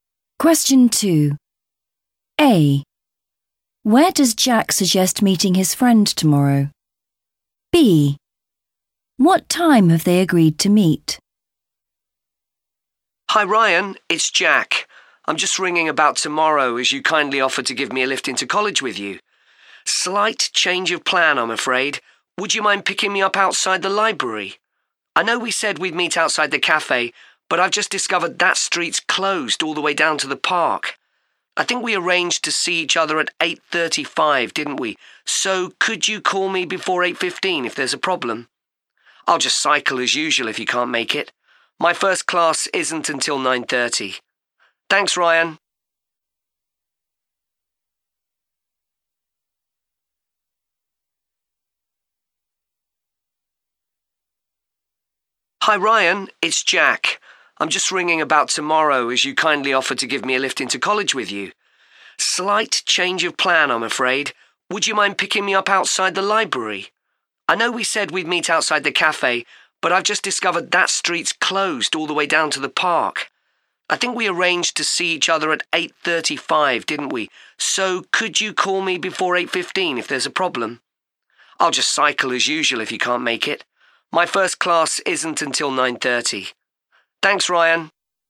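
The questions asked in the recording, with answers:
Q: Where does Jack suggest meeting his friend tomorrow?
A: outside the library

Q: What time have they agreed to meet?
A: 8:35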